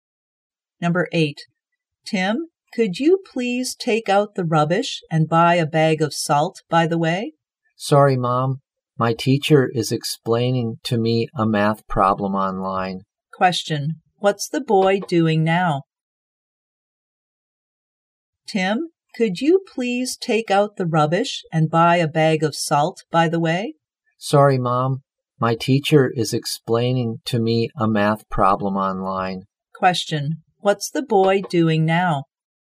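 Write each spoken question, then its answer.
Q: What's the boy doing now?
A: Having an online math lesson with his teacher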